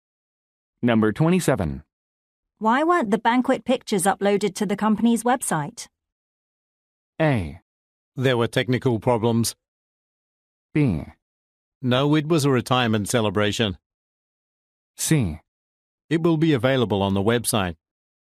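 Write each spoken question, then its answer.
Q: Why weren't the banquet pictures uploaded to the company's website?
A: A: There were technical problems.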